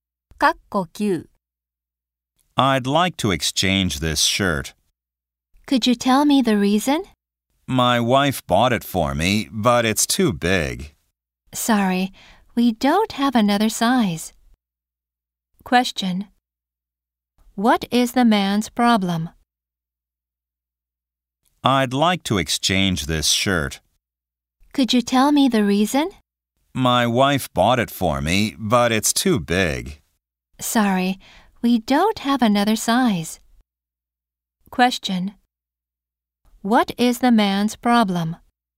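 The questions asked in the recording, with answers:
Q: What is the man's problem?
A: The shirt is too big and there is no other size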